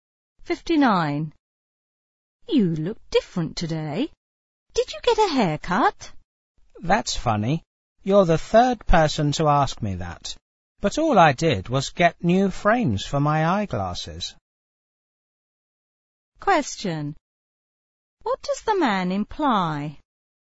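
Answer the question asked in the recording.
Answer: He didn't get a haircut; he got new eyeglass frames.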